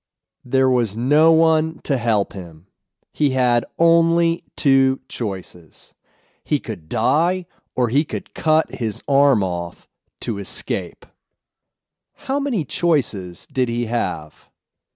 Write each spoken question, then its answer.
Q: How many choices did he have?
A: He had only two choices.